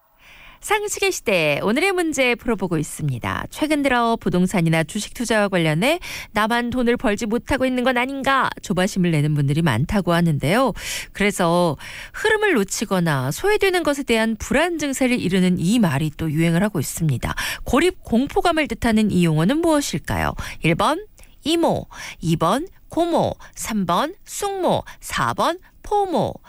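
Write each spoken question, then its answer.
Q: 고립 공포감을 뜻하는 이 용어는 무엇일까요?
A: 4: 포모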